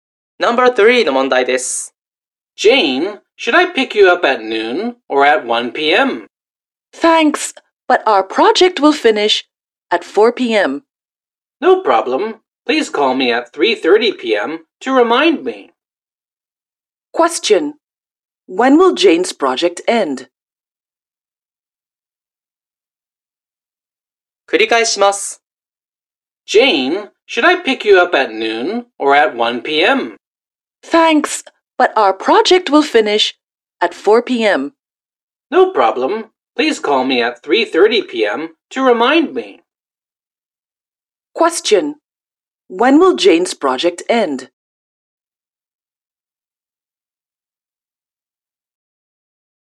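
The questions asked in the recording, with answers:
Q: When will Jane's project end?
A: At 4 p.m.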